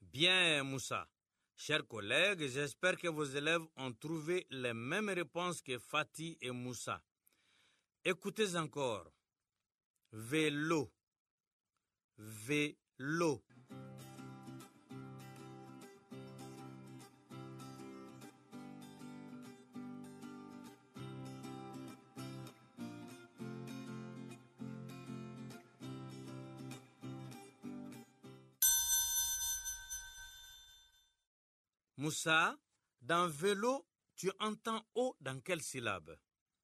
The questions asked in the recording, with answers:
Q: Moussa, dans vélo, tu entends O dans quelle syllabe?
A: Monsieur, dans l'eau, la deuxième syllabe.